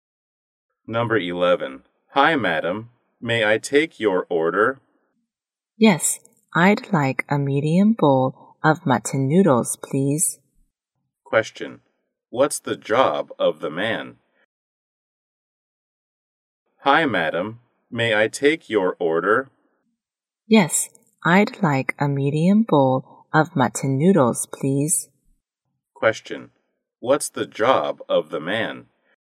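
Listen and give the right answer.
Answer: A waiter.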